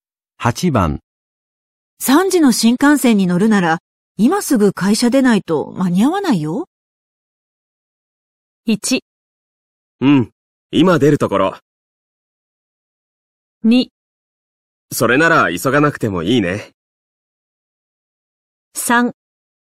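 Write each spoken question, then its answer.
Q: 3時の新幹線に乗るなら、今すぐ会社出ないと間に合わないよ。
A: 1: うん、今出るところ。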